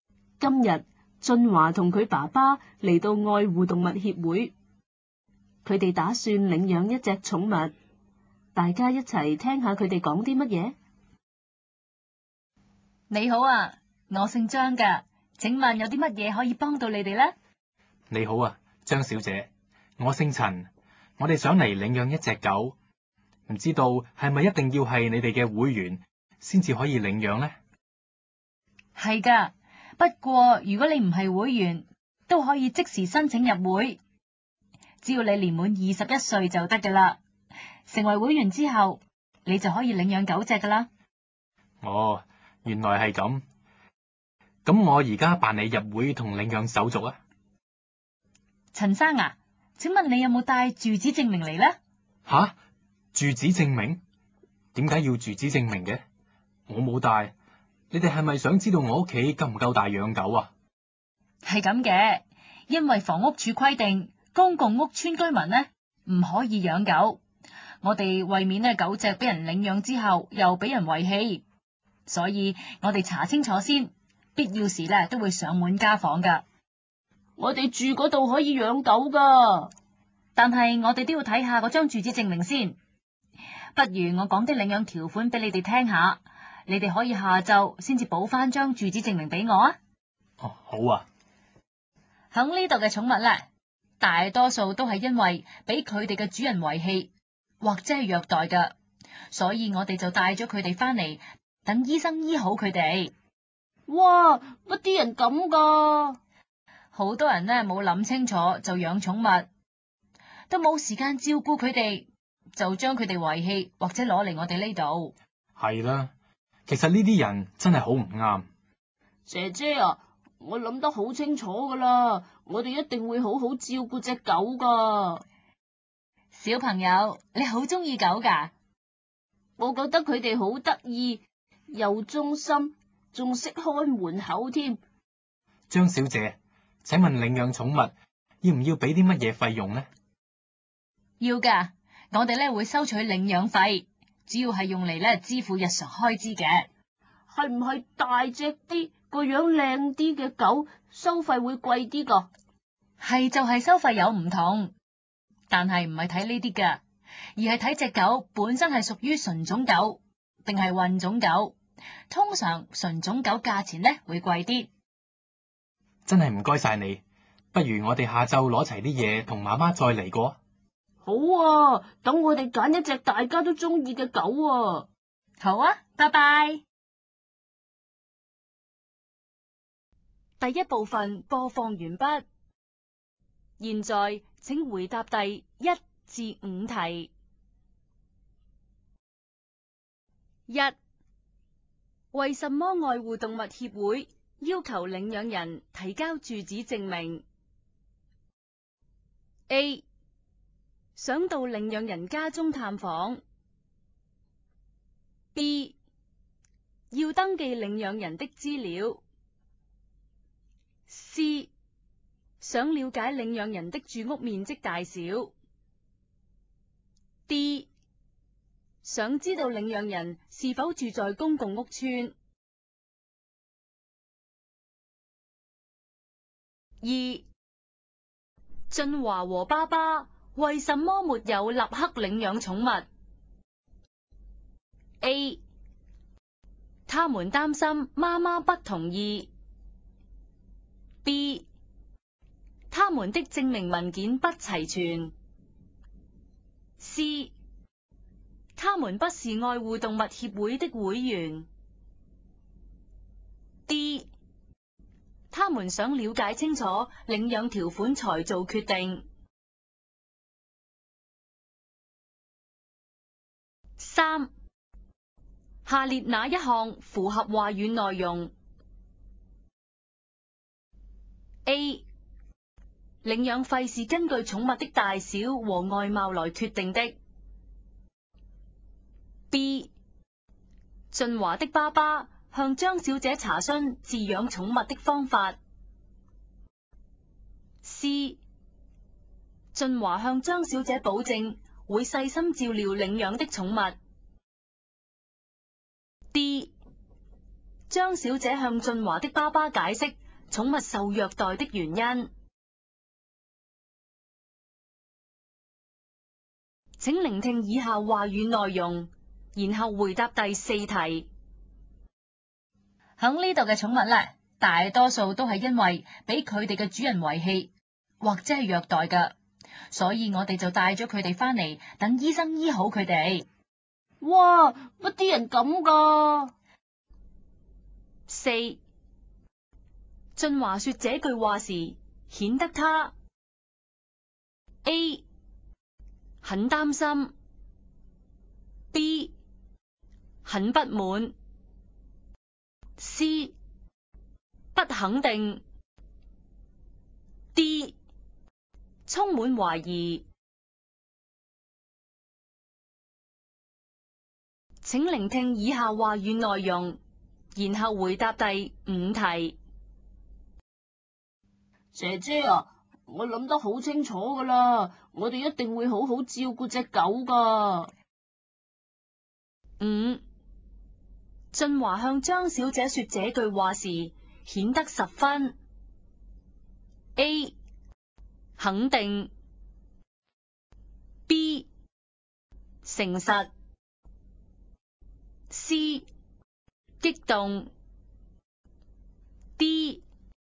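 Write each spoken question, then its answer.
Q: 为什么爱护动物协会要求领养人提交住址证明?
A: D: 想知道领养人是否住在公共屋邨。

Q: 俊华和爸爸为什么没有立刻领养宠物?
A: B: 他们的证明文件不齐全。

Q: 下列哪一项符合话语内容?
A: C: 俊华向张小姐保证会细心照料领养的宠物。

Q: 俊华说这句话时显得他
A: B: 很不满

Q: 俊华向张小姐说这句话时显得十分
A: A: 肯定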